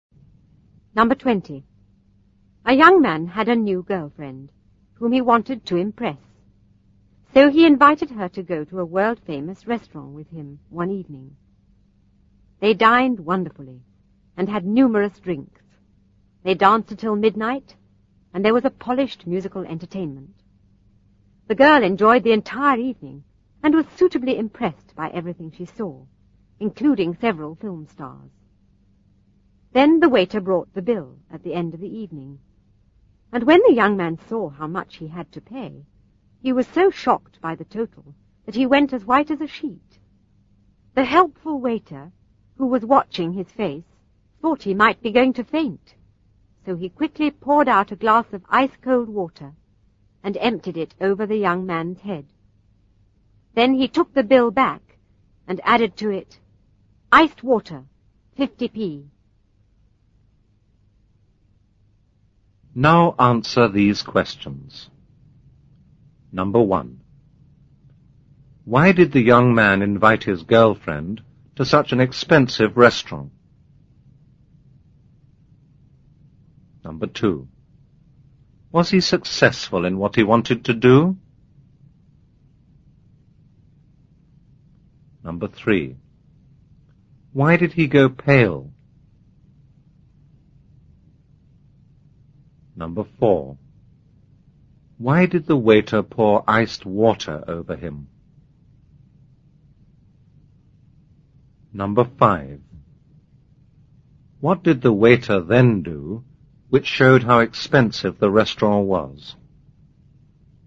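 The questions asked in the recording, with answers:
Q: Why did the young man invite his girlfriend to such an expensive restaurant?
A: He wanted to impress her.

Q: Was he successful in what he wanted to do?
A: Yes, she was suitably impressed.

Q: Why did he go pale?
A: He was shocked by how much the bill was.

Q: Why did the waiter pour iced water over him?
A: He thought the young man might faint.

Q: What did the waiter then do, which showed how expensive the restaurant was?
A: He added 50p for the iced water to the bill.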